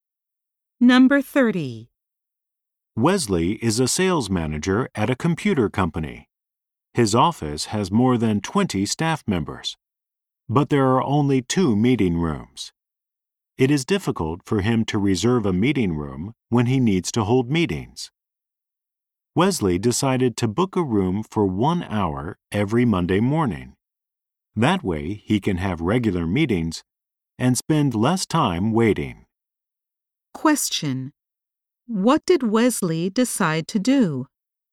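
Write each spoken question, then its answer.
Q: What did Wesley decide to do?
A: Book a meeting room for 1 hour every Monday morning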